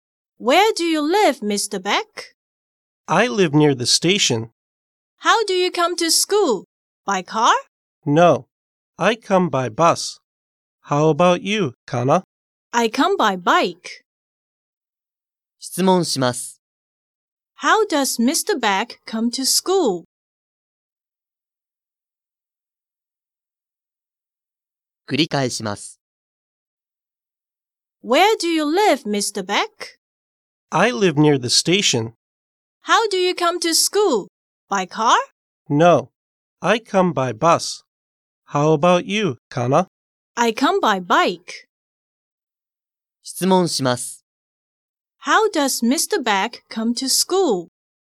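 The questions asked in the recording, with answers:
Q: How does Mr. Beck come to school?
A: By bus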